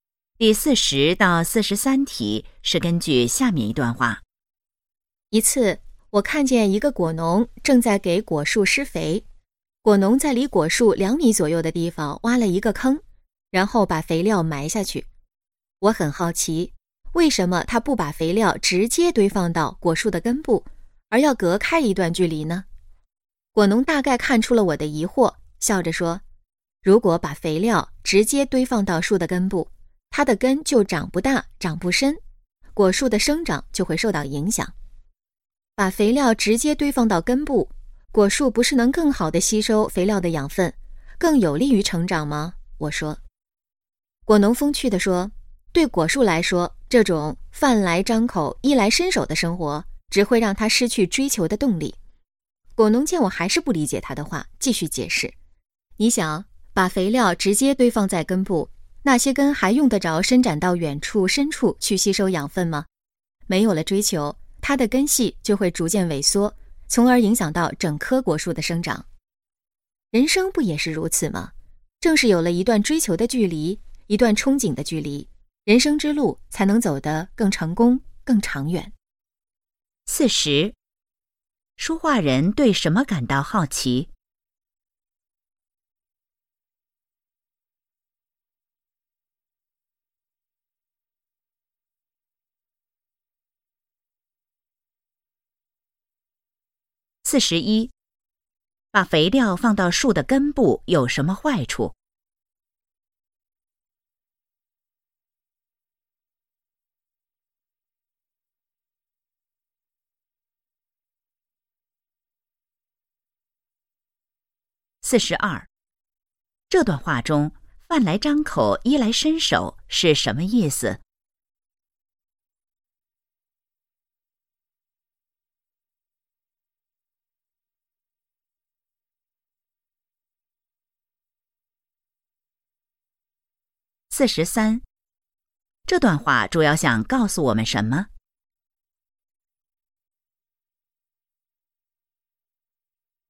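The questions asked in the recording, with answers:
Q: 说话人对什么感到好奇?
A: 果农为什么把肥料埋在离果树较远的地方

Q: 把肥料放到树的根部有什么坏处?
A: 根长不大、长不深,影响果树生长

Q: 这段话中"饭来张口,衣来伸手"是什么意思?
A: 不用努力就能得到一切

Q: 这段话主要想告诉我们什么?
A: 有追求的距离,人生才能更成功、更长远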